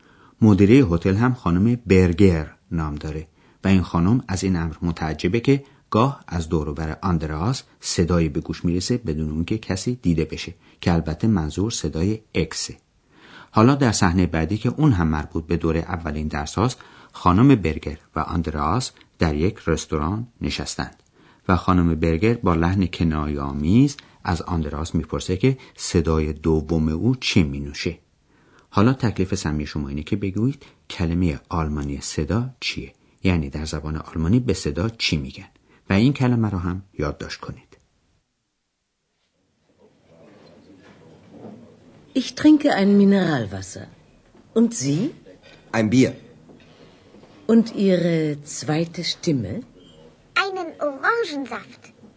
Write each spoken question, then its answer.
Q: حالا تکلیف سمی شما اینه که بگویید کلمه آلمانی صدا چیه، یعنی در زبان آلمانی به صدا چی میگن، و این کلمه رو هم یادداشت کنید.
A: کلمه چهارم واژه صدا در زبان آلمانی بود که میشه شتیمه.